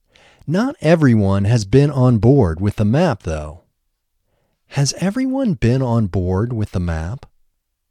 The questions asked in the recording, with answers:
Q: Has everyone been on board with the map?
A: No, not everyone has been on board with the map.